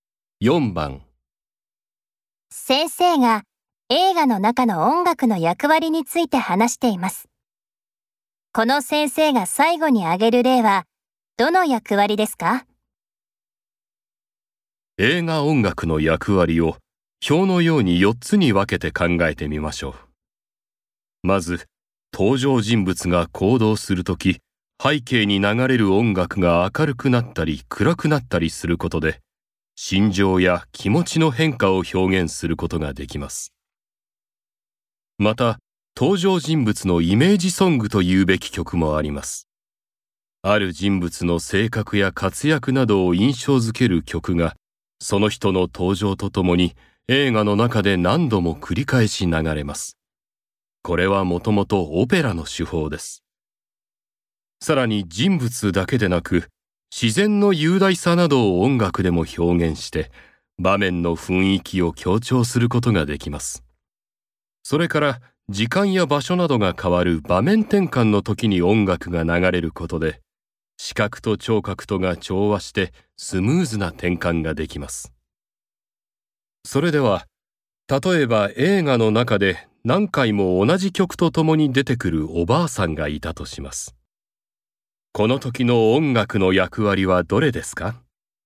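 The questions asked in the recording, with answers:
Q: この先生が最後に挙げる例はどの役割ですか?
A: 登場人物のイメージソング(人物の性格や活躍を印象付ける役割)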